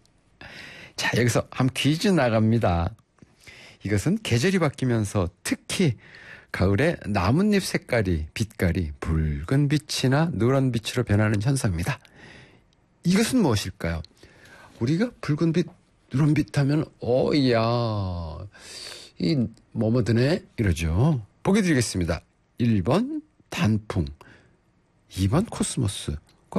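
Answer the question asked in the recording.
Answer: 1: 단풍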